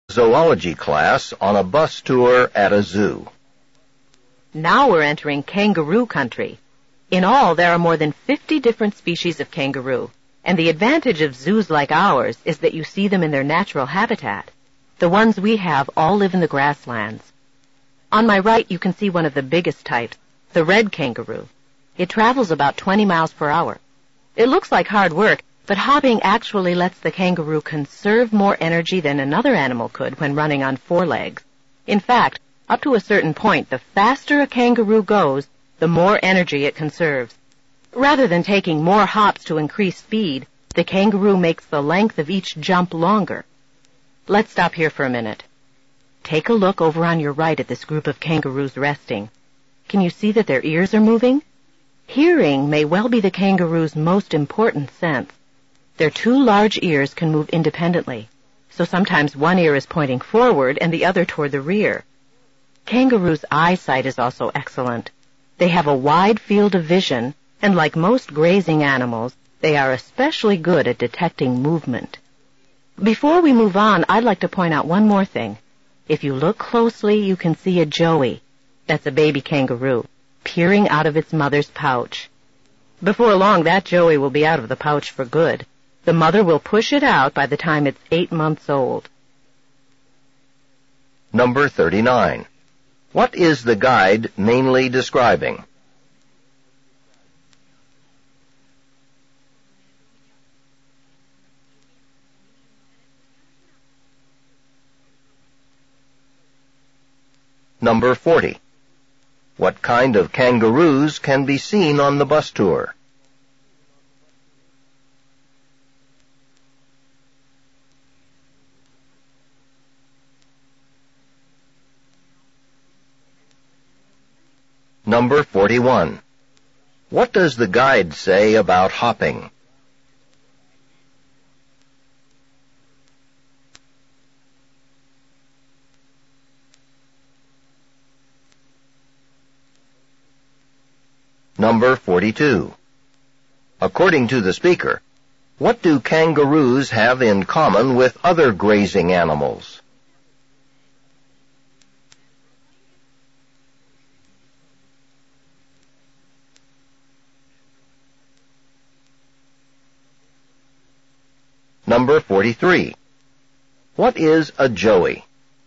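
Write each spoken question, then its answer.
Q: What is the guide mainly describing?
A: Kangaroos at the zoo

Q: What kind of kangaroos can be seen on the bus tour?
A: Kangaroos that live in the grasslands

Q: What does the guide say about hopping?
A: It lets kangaroos conserve energy

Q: According to the speaker, what do kangaroos have in common with other grazing animals?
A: They are good at detecting movement

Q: What is a joey?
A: A baby kangaroo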